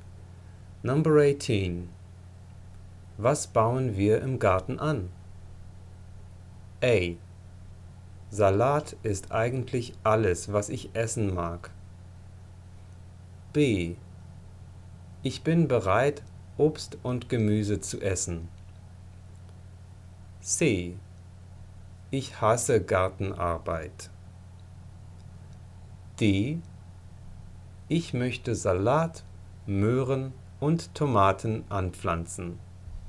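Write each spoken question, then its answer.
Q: Was bauen wir im Garten an?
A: D: Ich möchte Salat, Möhren und Tomaten anpflanzen.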